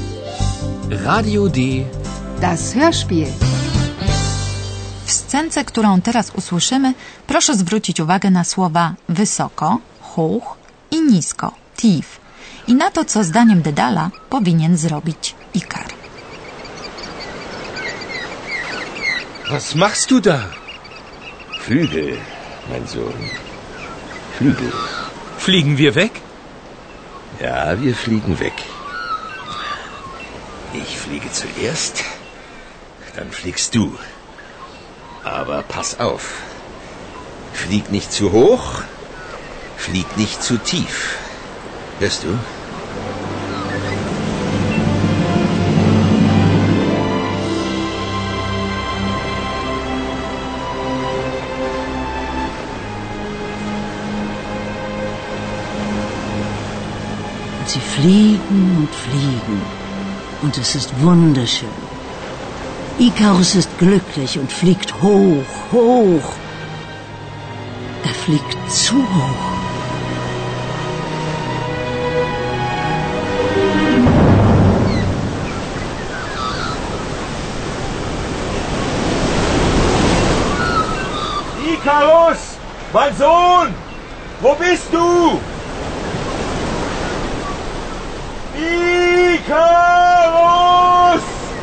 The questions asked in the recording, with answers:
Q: W scence, którą teraz usłyszymy, proszę zwrócić uwagę na słowa wysoko, hoch i nisko, tief, i na to, co zdaniem Dedala powinien zrobić Ikar.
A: Dedal zaleca Ikarowi, żeby nie leciał wysoko.